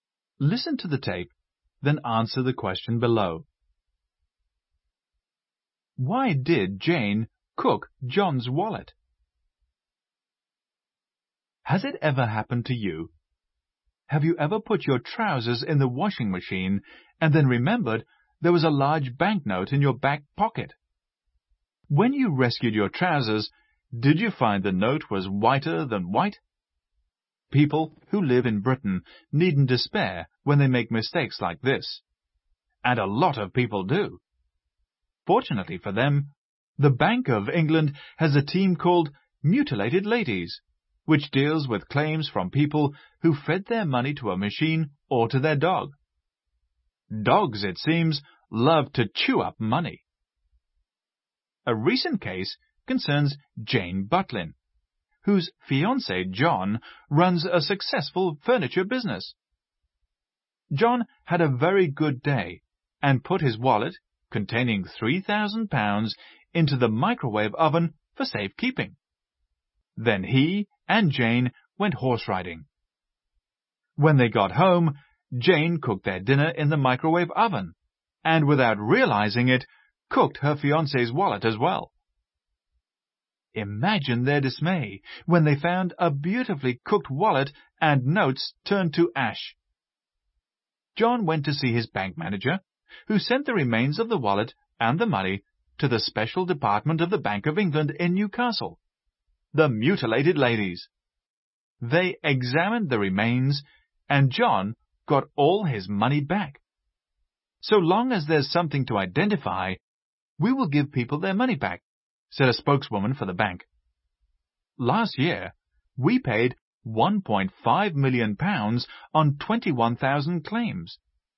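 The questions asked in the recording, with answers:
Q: Why did Jane cook John's wallet?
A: She didn't know it was in the microwave oven, where John had put it for safekeeping.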